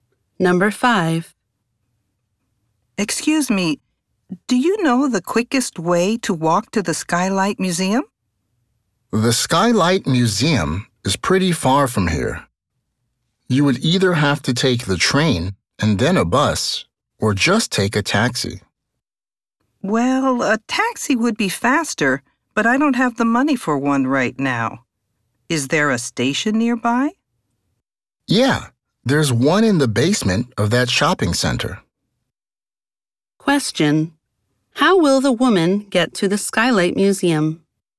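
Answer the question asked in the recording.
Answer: By train and then a bus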